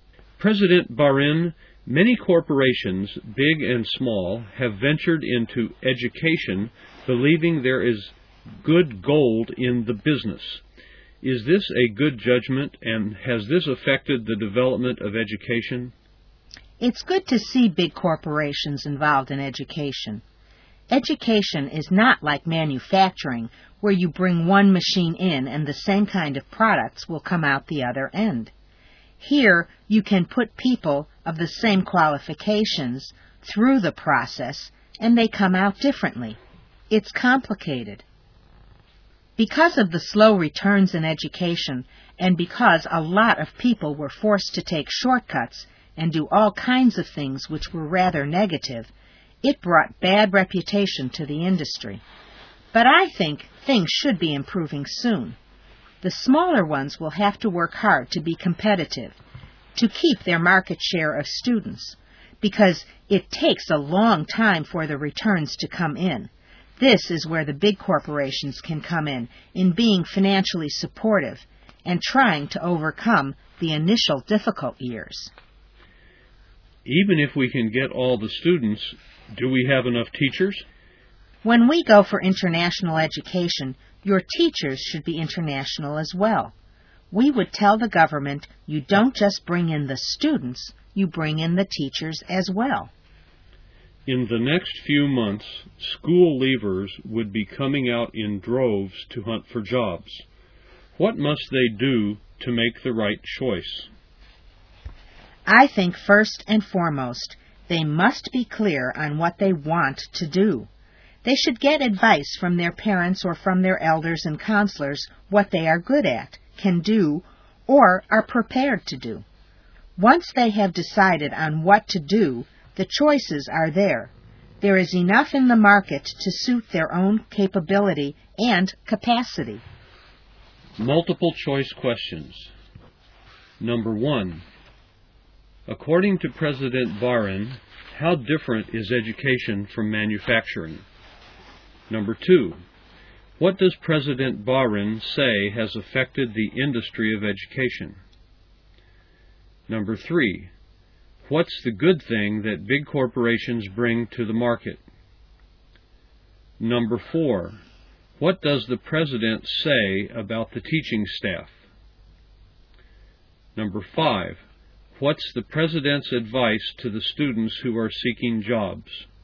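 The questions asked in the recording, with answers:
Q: according to President Barin, how different is education from manufacturing?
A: People with the same qualifications come out differently, unlike identical products from a machine

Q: what does President Barin say has affected the industry of education?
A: Slow returns led people to take shortcuts and do negative things, which gave the industry a bad reputation

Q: what's the good thing that big corporations bring to the market?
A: Financial support to get through the difficult early years

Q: what does the president say about the teaching staff?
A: There may not be enough teachers, and international education needs international teachers brought in too

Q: what's the president's advice to the students who are seeking jobs?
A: Be clear on what they want to do and get advice from parents, elders and counselors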